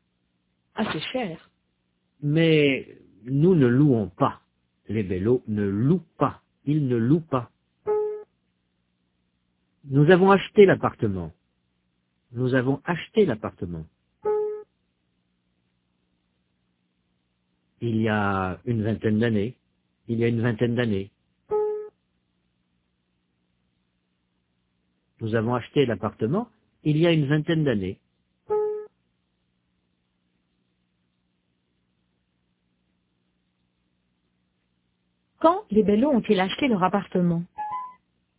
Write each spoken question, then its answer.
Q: Quand les Bello ont-ils acheté leur appartement?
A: Il y a une vingtaine d'années.